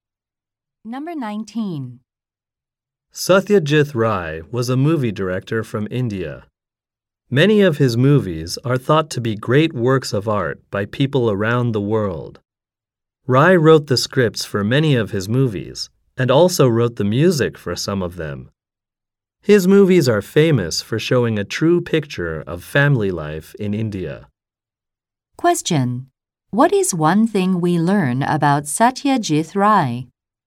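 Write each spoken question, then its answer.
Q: What is one thing we learn about Satyajit Rai?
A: He wrote scripts and some music for his movies.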